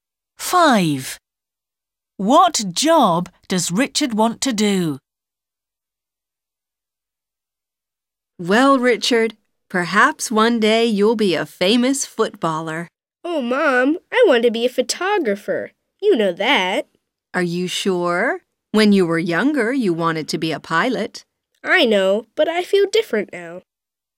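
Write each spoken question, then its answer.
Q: What job does Richard want to do?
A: photographer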